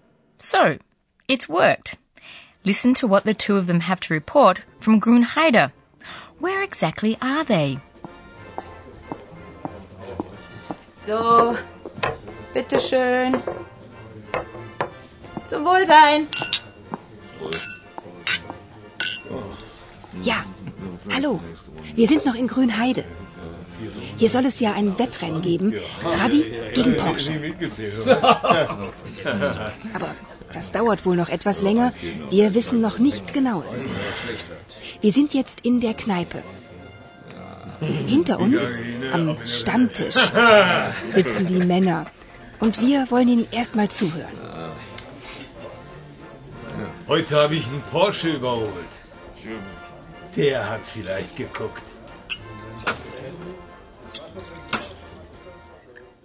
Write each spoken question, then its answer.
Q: Where exactly are they?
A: Philip and Paula are in the pub.